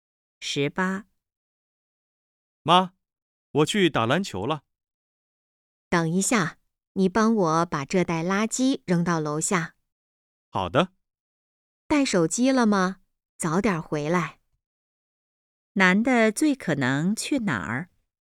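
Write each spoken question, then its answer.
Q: 男的最可能去哪儿?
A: 去打篮球(篮球场)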